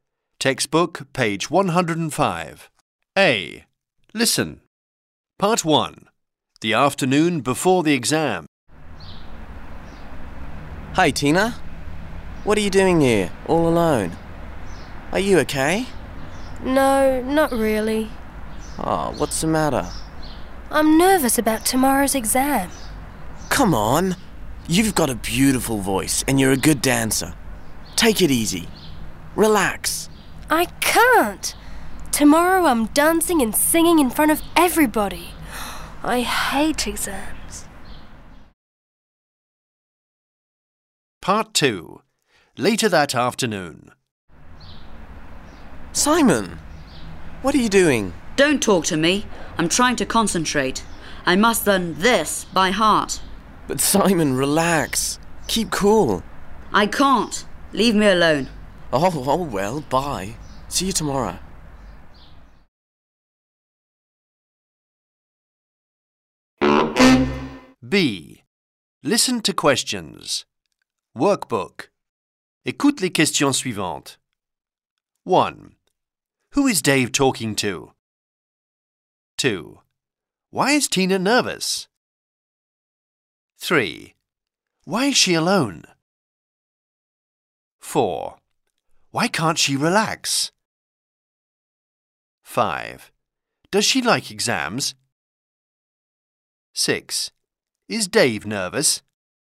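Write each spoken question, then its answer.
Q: Who is Dave talking to?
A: Tina

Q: Why is Tina nervous?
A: Because of tomorrow's exam

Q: Why can't she relax?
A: Tomorrow she's dancing and singing in front of everybody

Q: Does she like exams?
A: No, she hates exams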